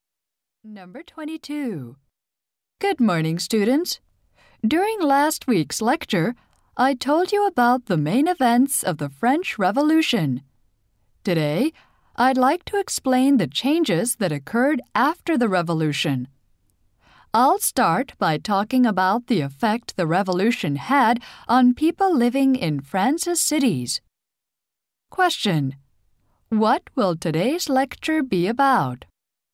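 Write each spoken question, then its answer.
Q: What will today's lecture be about?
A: Changes after the French Revolution.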